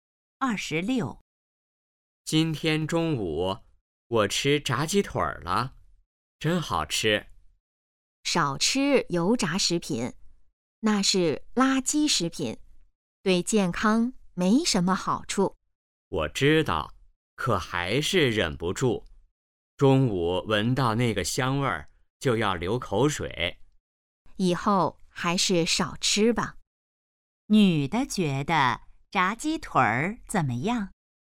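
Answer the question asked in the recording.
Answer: 是垃圾食品,对健康不好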